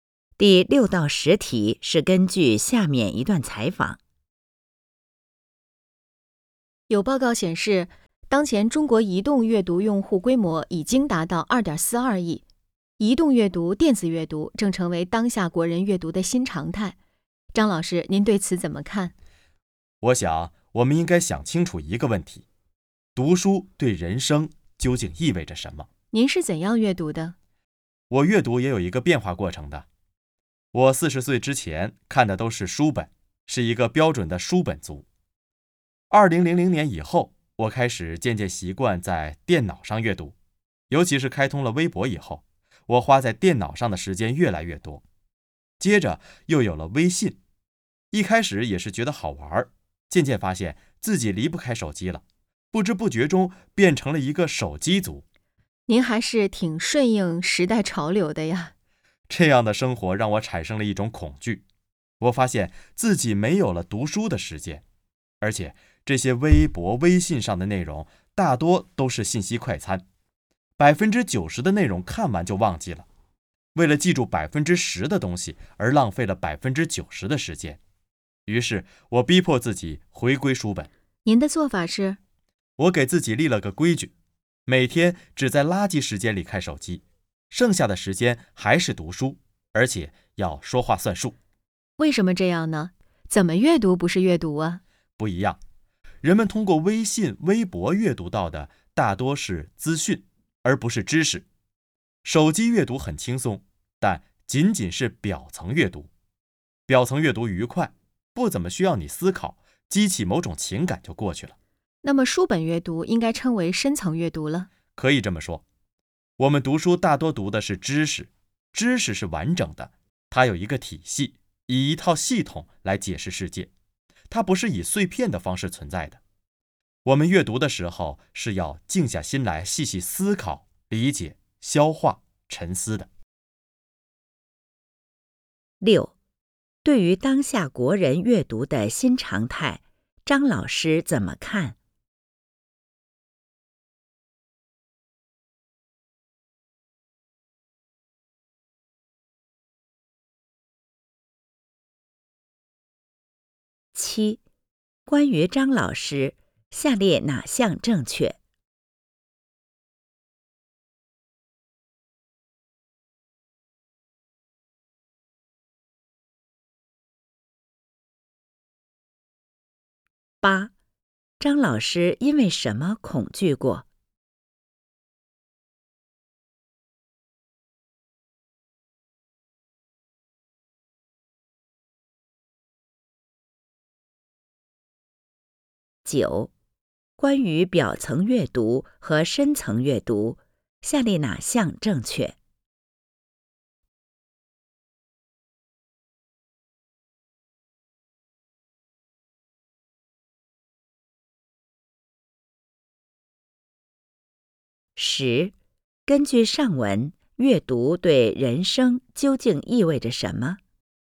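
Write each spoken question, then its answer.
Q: 张老师因为什么恐惧过?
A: 发现自己没有了读书的时间,浪费时间看信息快餐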